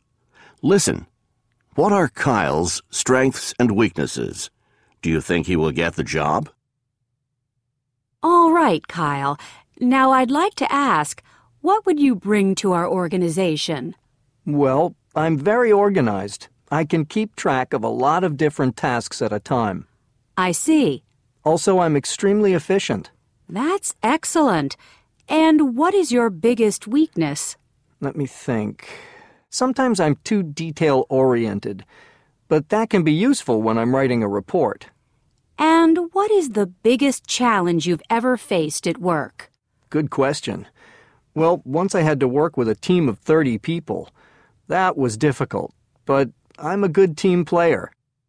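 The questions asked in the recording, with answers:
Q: What are Kyle's strengths and weaknesses?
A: Strengths: very organized, extremely efficient, a good team player; weakness: sometimes too detail-oriented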